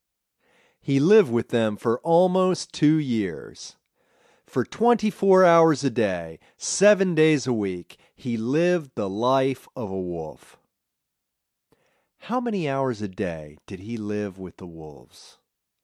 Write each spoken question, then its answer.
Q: How many hours a day did he live with the wolves?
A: He lived with them for 24 hours a day.